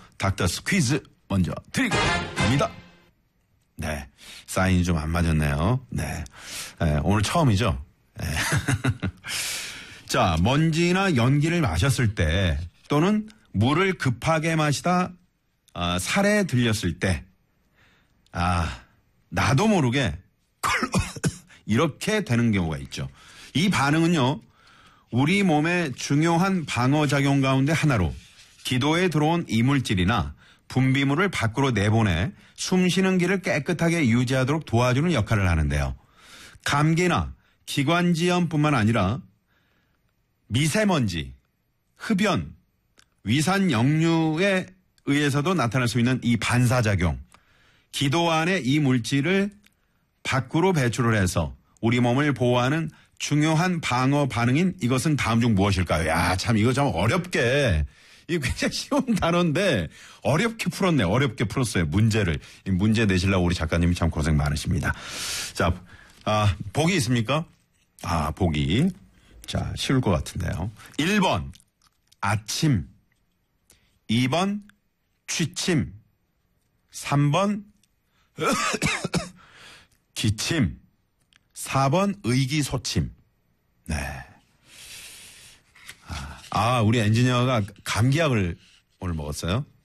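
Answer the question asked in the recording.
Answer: 3: 기침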